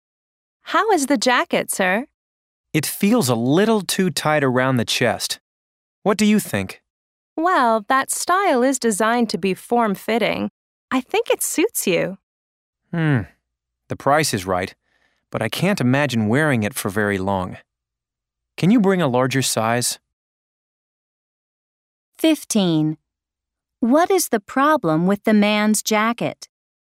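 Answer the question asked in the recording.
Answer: It is too tight around the chest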